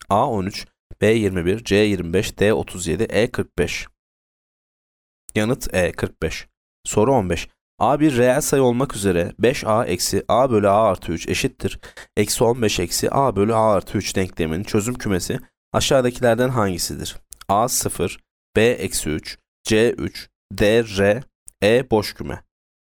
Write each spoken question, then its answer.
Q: Eksi 15 eksi a bölü a artı 3 denkleminin çözüm kümesi aşağıdakilerden hangisidir?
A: Yanıt E boş küme.